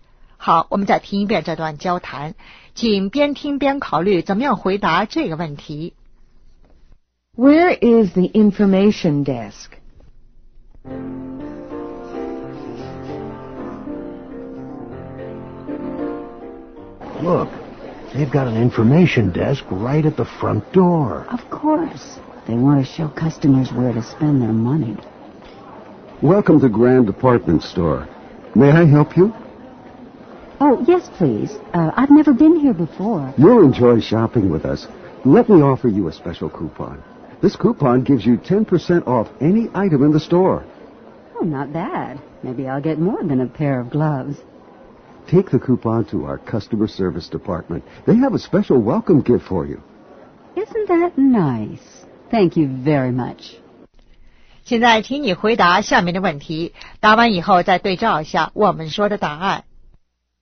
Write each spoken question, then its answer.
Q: Where is the information desk?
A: Right at the front door.